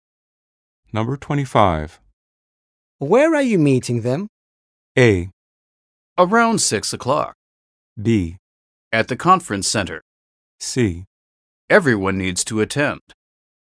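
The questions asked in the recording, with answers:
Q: Where are you meeting them?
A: B: At the conference center.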